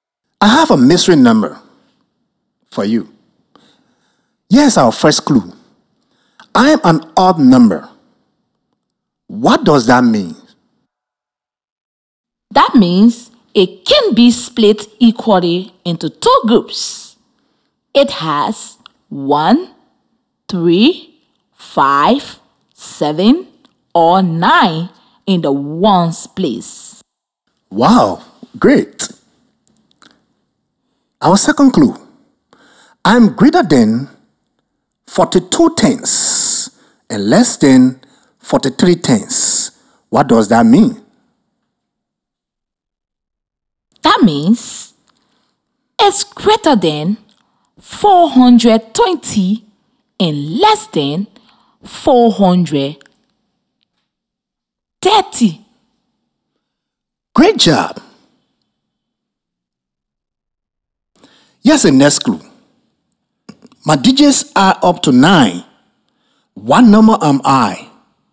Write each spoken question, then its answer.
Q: What number am I?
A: The number has to be 423.